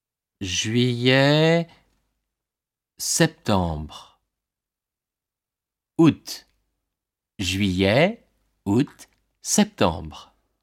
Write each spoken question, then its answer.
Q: Juillet, septembre.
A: Août.